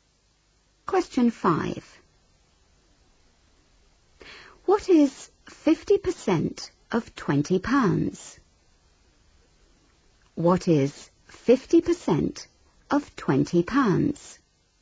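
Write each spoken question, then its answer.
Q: What is 50% of £20?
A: £10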